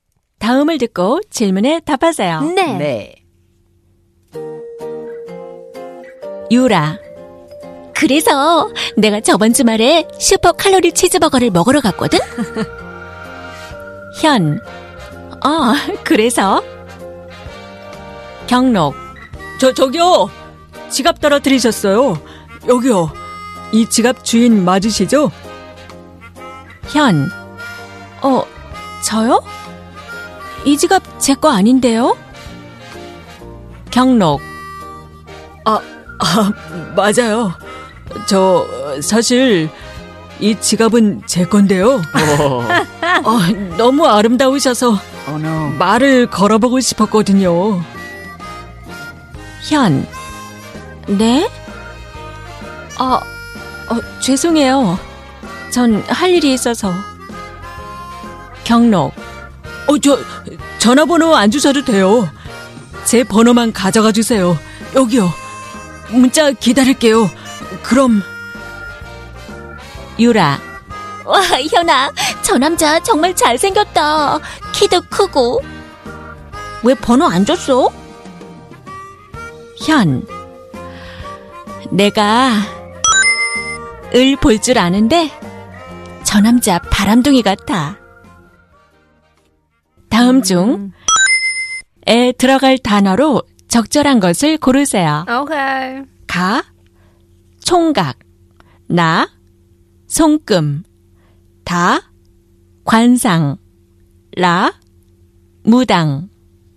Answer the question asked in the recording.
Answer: the correct answer is kwansang.